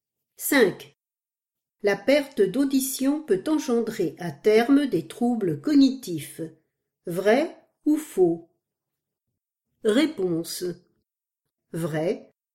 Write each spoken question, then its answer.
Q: La perte d'audition peut engendrer à terme des troubles cognitifs.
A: Vrai.